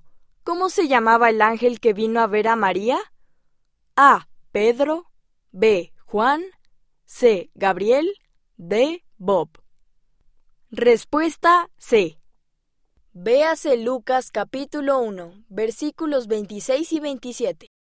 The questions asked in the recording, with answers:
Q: ¿Cómo se llamaba el ángel que vino a ver a María?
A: Respuesta C.